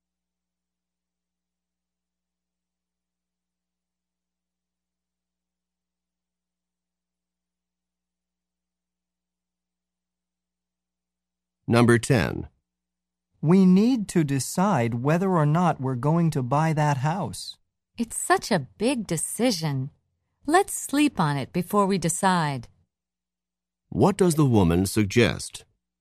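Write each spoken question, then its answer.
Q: What does the woman suggest?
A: Waiting until tomorrow to decide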